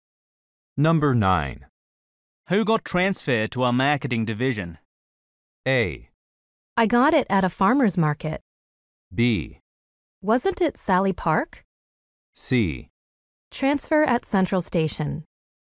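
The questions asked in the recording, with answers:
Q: Who got transferred to our marketing division?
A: B: Wasn't it Sally Park?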